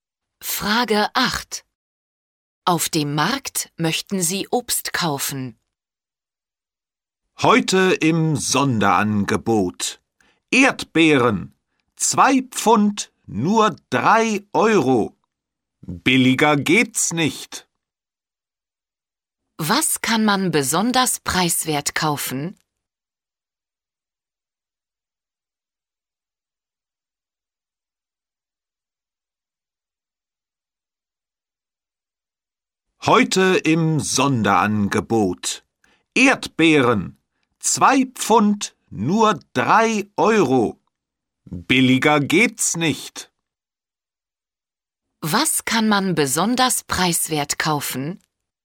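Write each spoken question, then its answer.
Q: Was kann man besonders preiswert kaufen?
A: Erdbeeren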